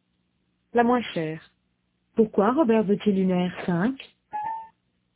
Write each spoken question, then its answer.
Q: Pourquoi Robert veut-il une R5?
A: Parce qu'il paraît que ce sont les moins chers.